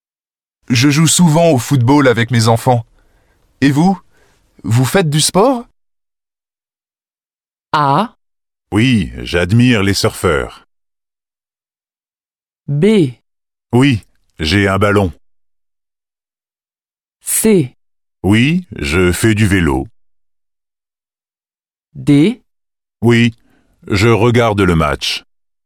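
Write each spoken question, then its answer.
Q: Et vous? Vous faites du sport?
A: C: Oui, je fais du vélo.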